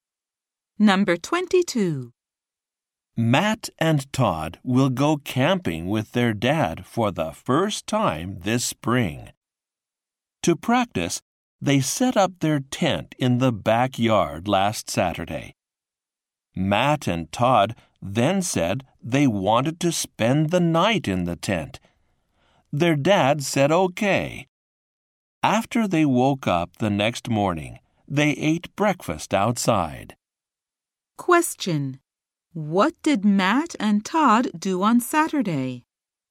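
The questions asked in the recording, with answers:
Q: What did Matt and Todd do on Saturday?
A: They set up their tent in the backyard and slept in it.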